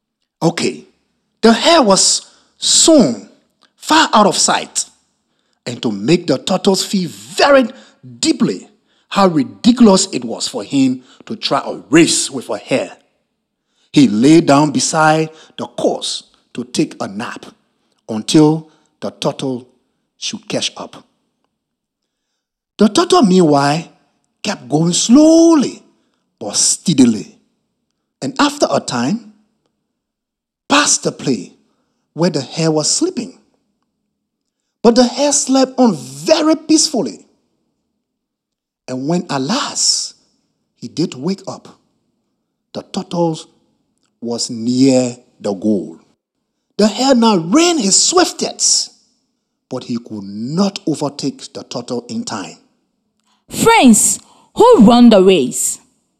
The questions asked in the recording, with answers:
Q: Friends, who run the race?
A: The turtles.